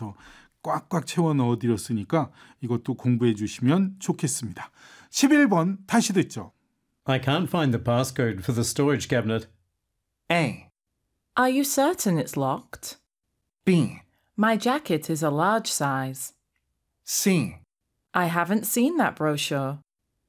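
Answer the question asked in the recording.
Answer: A: Are you certain it's locked?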